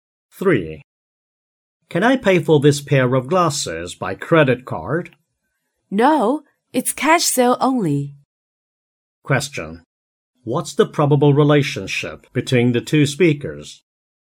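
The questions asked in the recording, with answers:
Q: What's the probable relationship between the two speakers?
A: Customer and shop assistant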